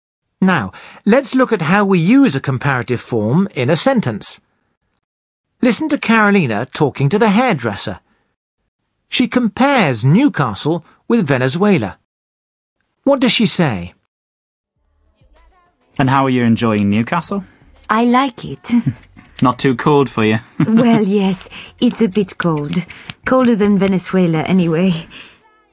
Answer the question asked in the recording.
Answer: She says that Newcastle is colder than Venezuela.